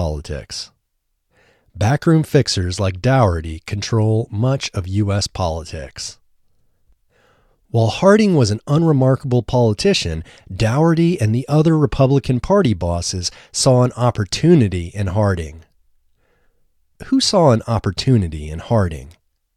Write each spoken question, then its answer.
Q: Who saw an opportunity in Harding?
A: Daugherty and the other Republican Party bosses saw an opportunity in Harding.